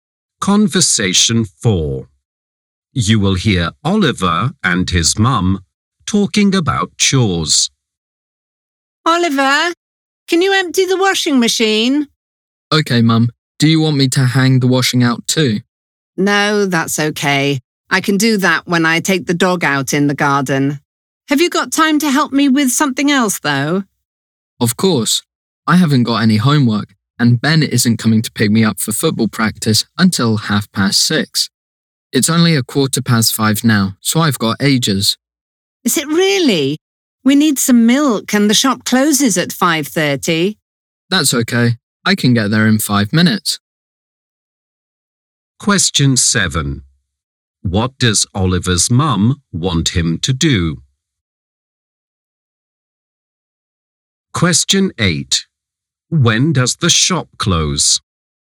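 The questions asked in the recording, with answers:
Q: When does the shop close?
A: At 5:30.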